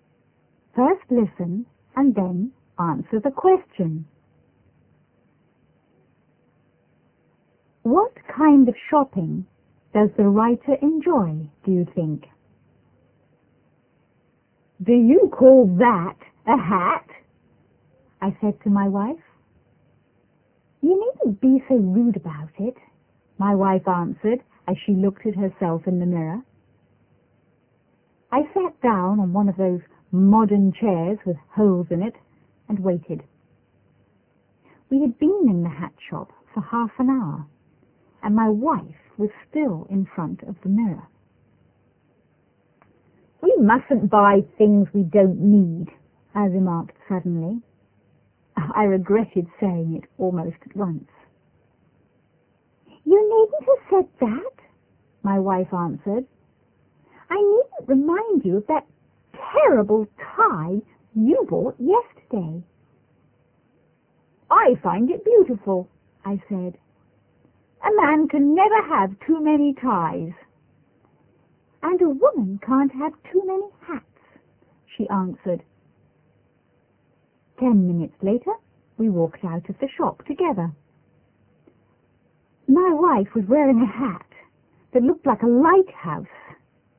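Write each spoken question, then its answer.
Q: What kind of shopping does the writer enjoy, do you think?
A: Buying ties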